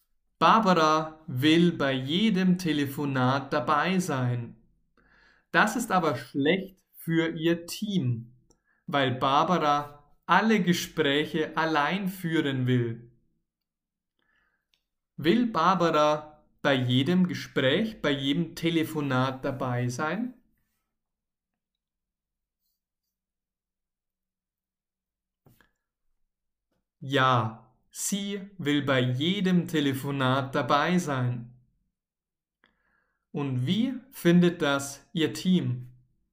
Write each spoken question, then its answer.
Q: Und wie findet das ihr Team?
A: Schlecht. Ihr Team findet das schlecht.